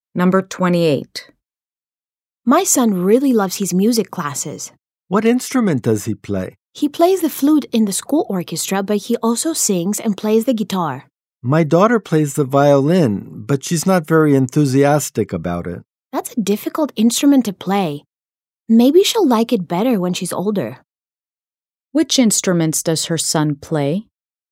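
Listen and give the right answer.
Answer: The flute and the guitar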